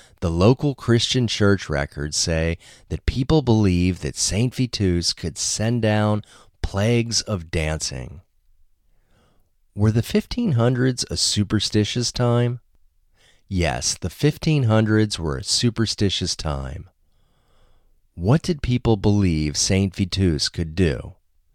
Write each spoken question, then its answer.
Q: What did people believe Saint Vitus could do?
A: People believed that Saint Vitus could send down plagues of dancing.